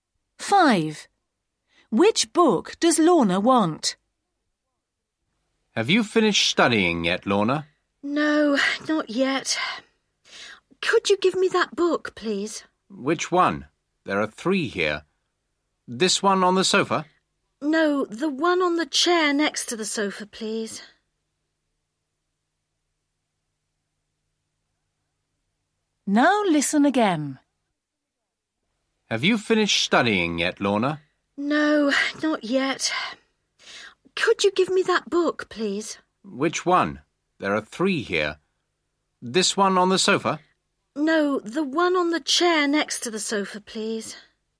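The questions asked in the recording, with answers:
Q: Which book does Lorna want?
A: The one on the chair next to the sofa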